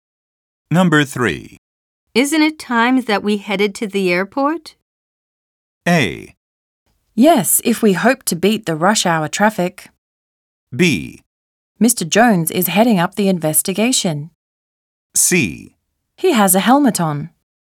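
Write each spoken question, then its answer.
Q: Isn't it time that we headed to the airport?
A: A: Yes, if we hope to beat the rush hour traffic.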